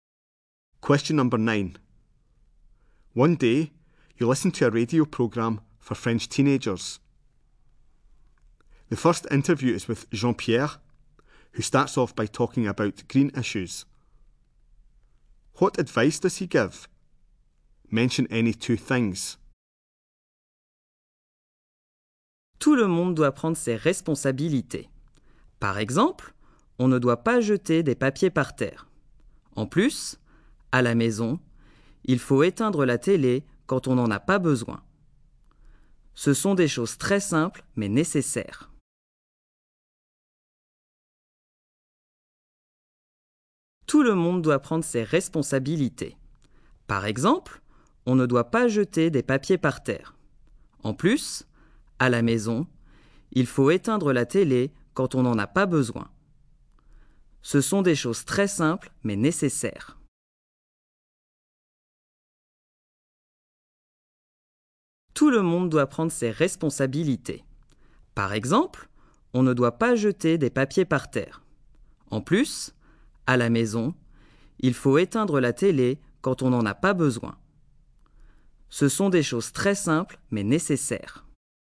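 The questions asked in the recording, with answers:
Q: What advice does he give?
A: Don't drop litter; switch off the TV when not needed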